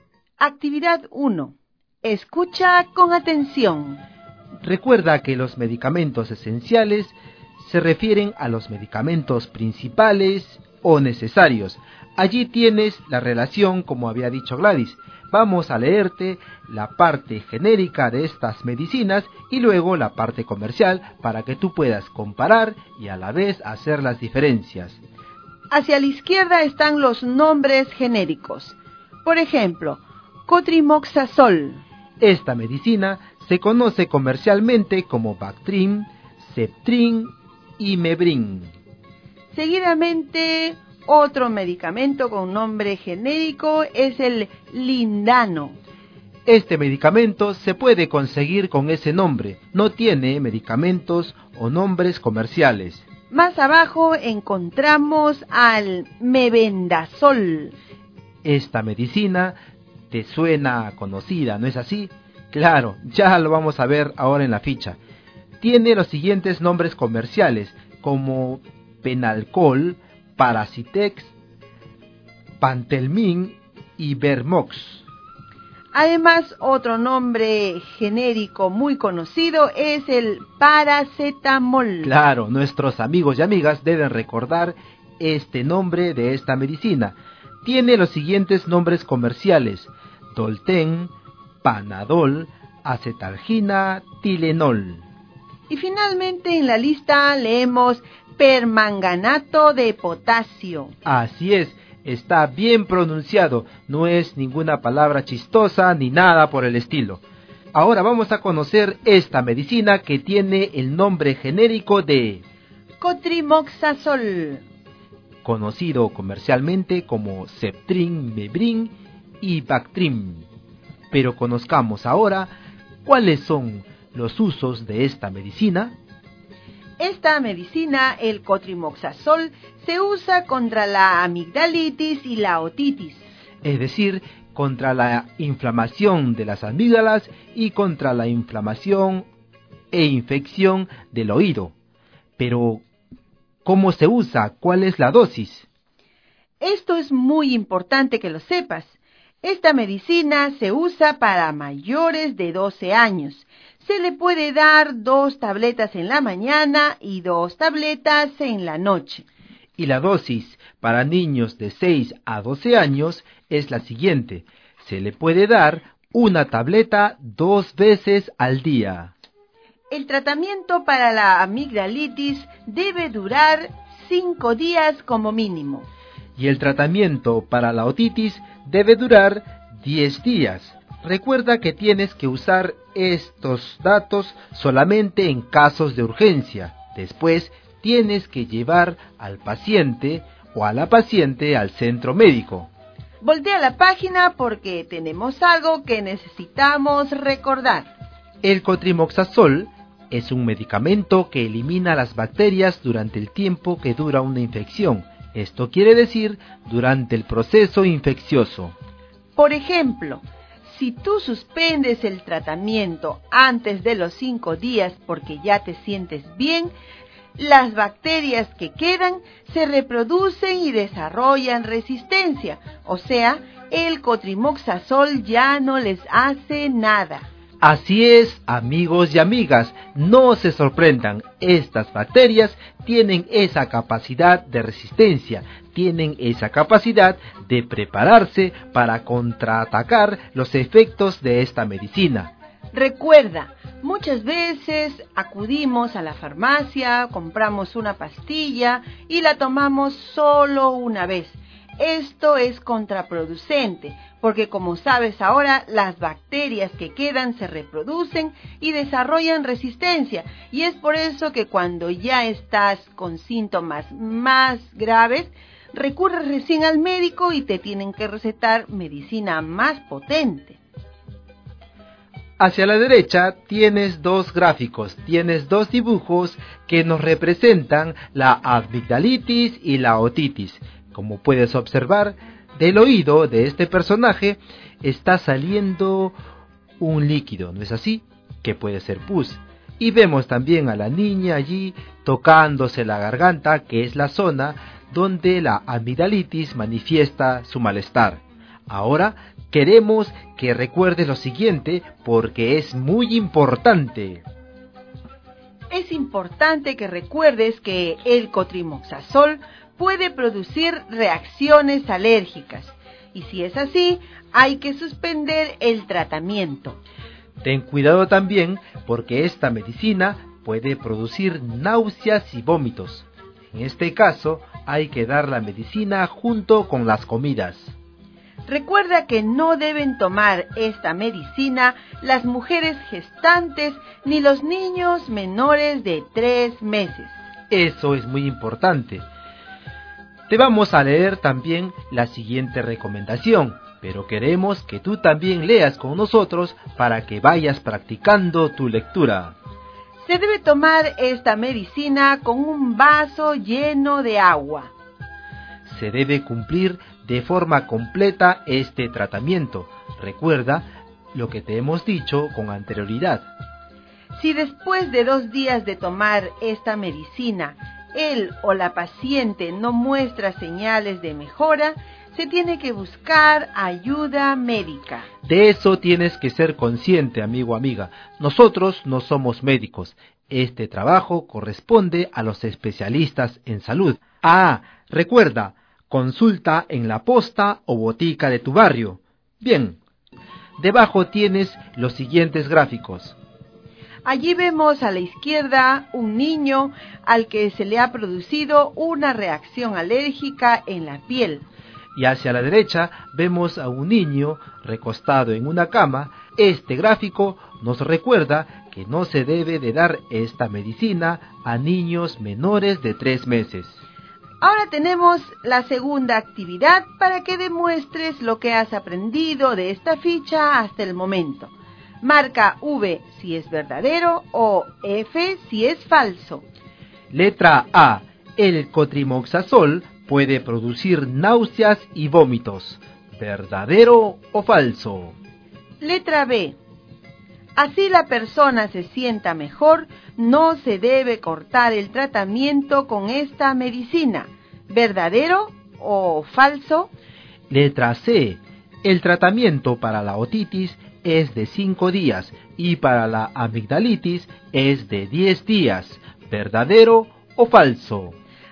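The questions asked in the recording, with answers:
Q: El cotrimoxazol puede producir náuseas y vómitos.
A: Verdadero

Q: Así la persona se sienta mejor, no se debe cortar el tratamiento con esta medicina.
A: Verdadero

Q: El tratamiento para la otitis es de 5 días y para la amigdalitis es de 10 días.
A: Falso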